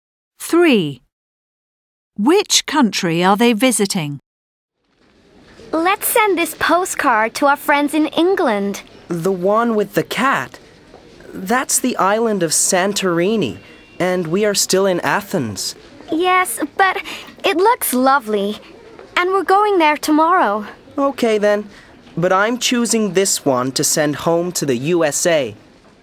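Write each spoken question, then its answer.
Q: Which country are they visiting?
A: Greece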